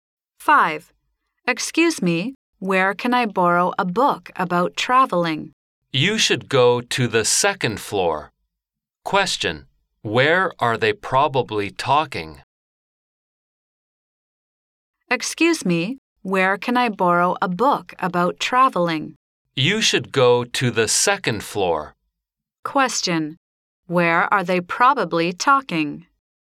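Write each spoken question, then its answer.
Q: Where are they probably talking?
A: In a library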